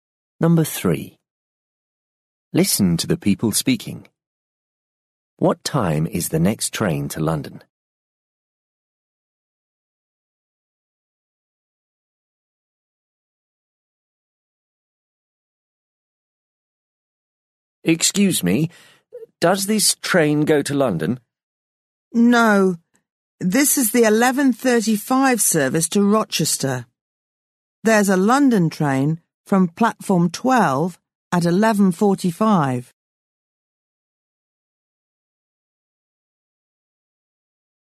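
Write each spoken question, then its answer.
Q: What time is the next train to London?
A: 11:45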